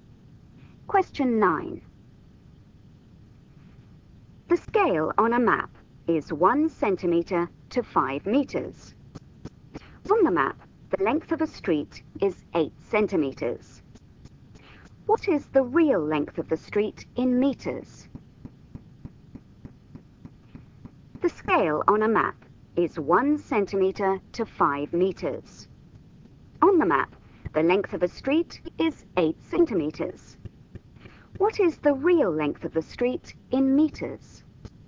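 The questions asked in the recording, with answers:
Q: What is the real length of the street in meters?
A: 40 meters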